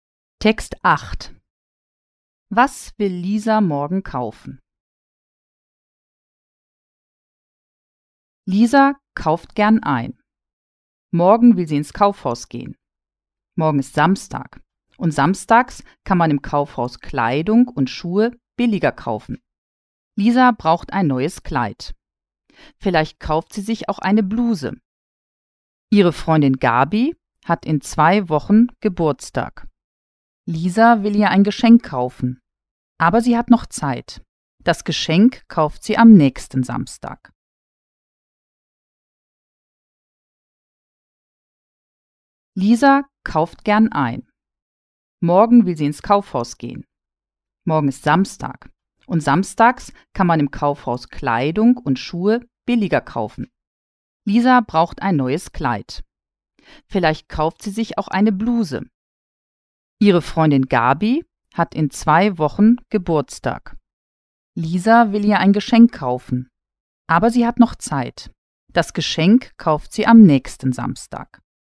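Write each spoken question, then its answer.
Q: Was will Lisa morgen kaufen?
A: Ein neues Kleid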